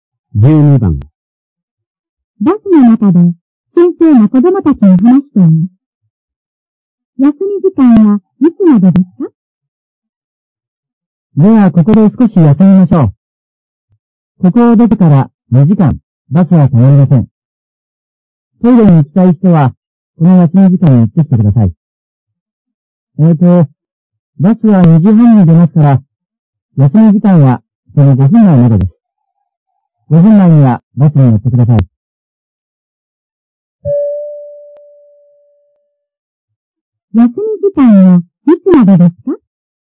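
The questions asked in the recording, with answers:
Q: 休み時間はいつまでですか?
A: 2時25分まで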